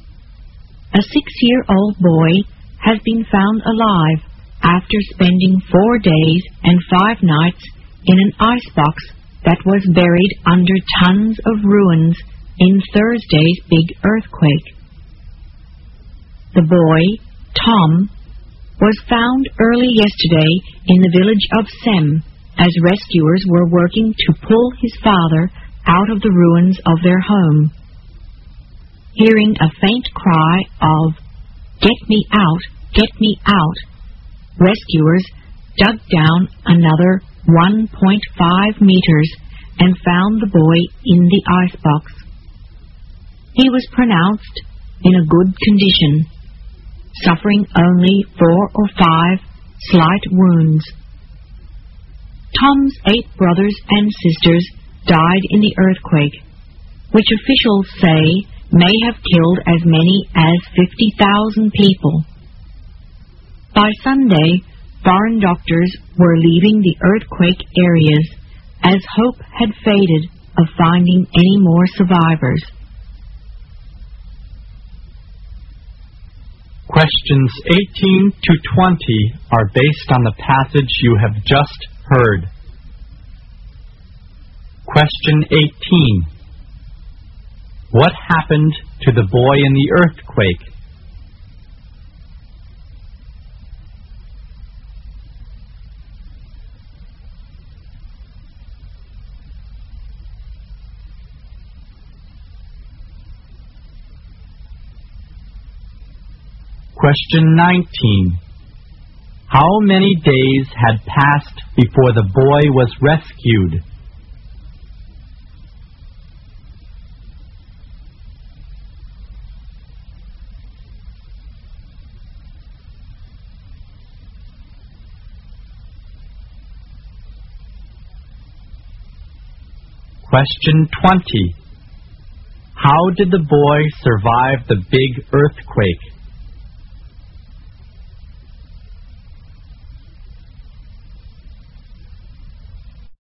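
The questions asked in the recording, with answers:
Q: How many days had passed before the boy was rescued?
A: 4 days and 5 nights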